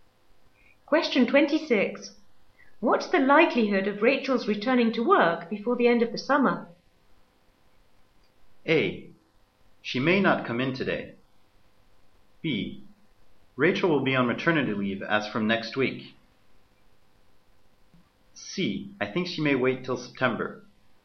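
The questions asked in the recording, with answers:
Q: What's the likelihood of Rachel's returning to work before the end of the summer?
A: C: I think she may wait till September.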